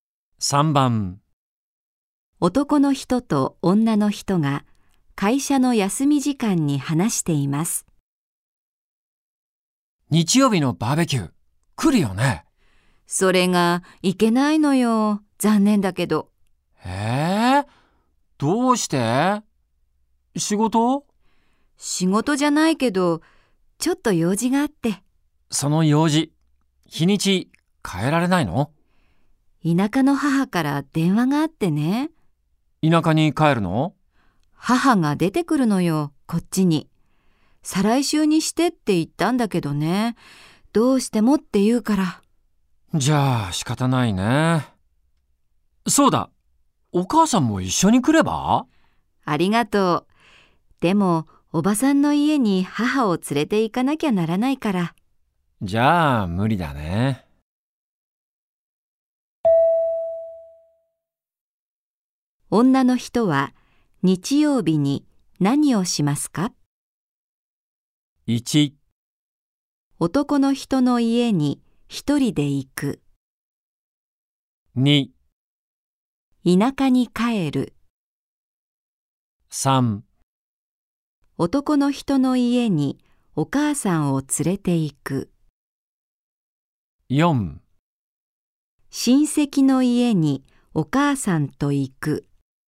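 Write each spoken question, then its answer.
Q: 女の人は日曜日に何をしますか?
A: 4: 親戚の家にお母さんと行く。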